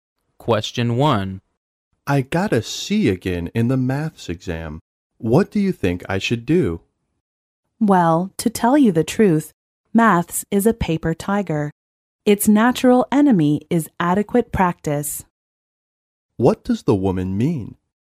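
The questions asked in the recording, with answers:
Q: What does the woman mean?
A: The man can do better at maths if he practises enough.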